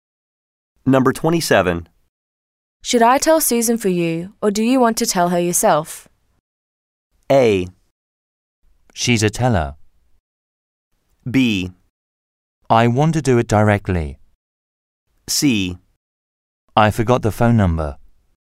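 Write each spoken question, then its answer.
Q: Should I tell Susan for you, or do you want to tell her yourself?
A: B: I want to do it directly.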